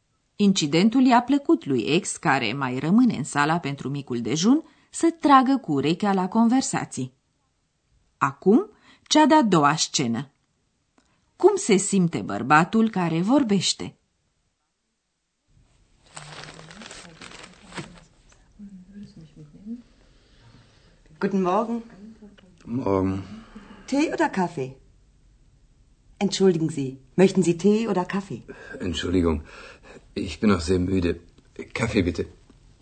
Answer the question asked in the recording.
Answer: Bărbatul cu pricina a venit la micul dejun cam adormit.